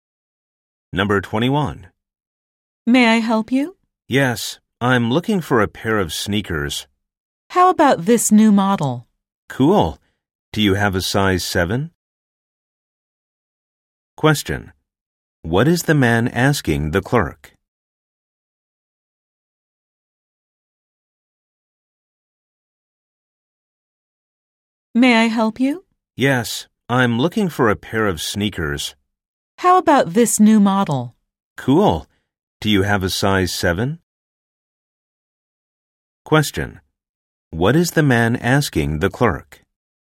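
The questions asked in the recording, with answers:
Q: What is the man asking the clerk?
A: Whether they have the sneakers in size 7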